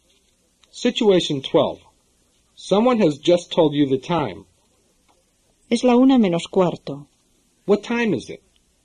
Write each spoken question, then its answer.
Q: What time is it?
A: It's a quarter to one.